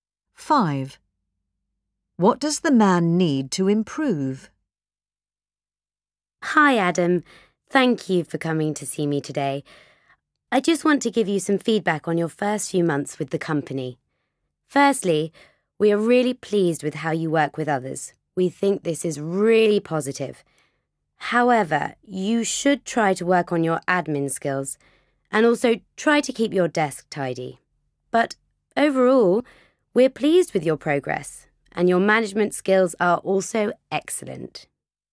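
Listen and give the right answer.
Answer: His admin skills and keeping his desk tidy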